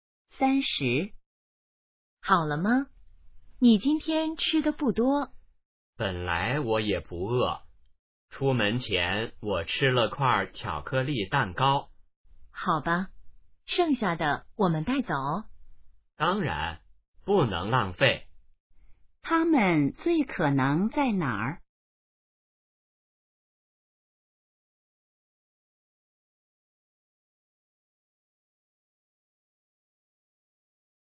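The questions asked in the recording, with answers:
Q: 他们最可能在哪儿?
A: 饭馆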